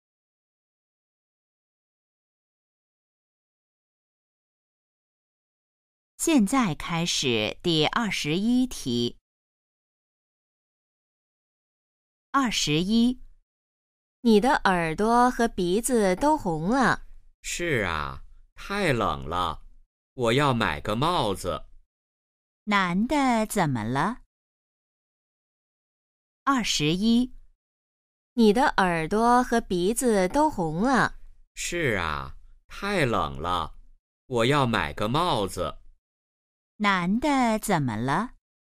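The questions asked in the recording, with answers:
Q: 男的怎么了?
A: 他很冷,耳朵和鼻子都红了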